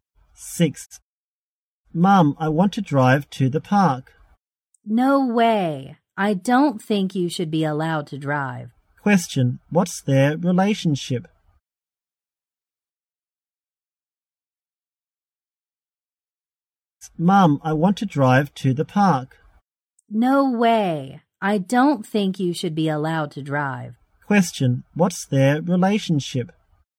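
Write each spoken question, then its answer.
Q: Question, what's their relationship?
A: Mother and child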